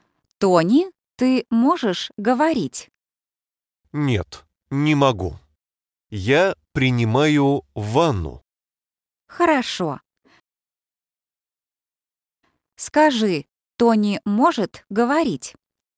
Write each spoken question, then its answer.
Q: Скажи, Тони может говорить?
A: Нет, он не может.